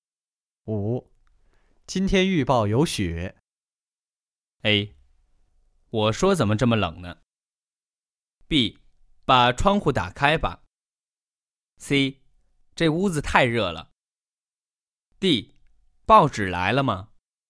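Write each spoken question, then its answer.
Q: 今天预报有雪。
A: A: 我说怎么这么冷呢?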